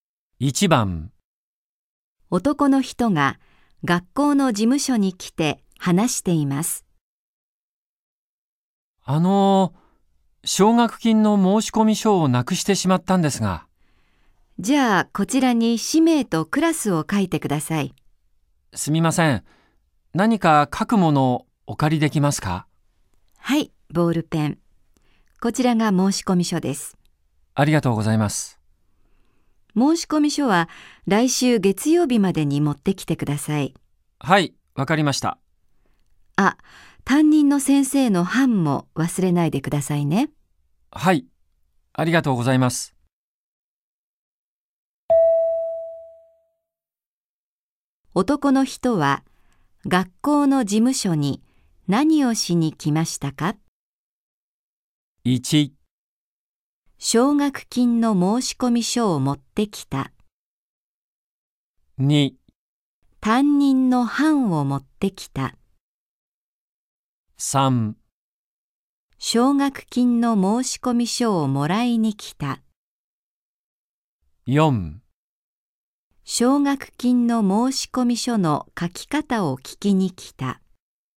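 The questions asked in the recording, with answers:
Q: 男の人は学校の事務所に何をしに来ましたか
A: 3: 奨学金の申し込み書をもらいに来た。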